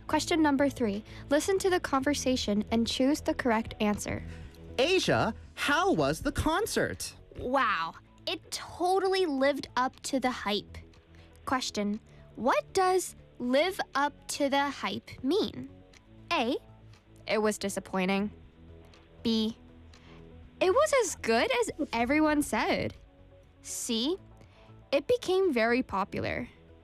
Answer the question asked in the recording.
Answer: 뭐 소문만큼 좋다 하는 뜻입니다.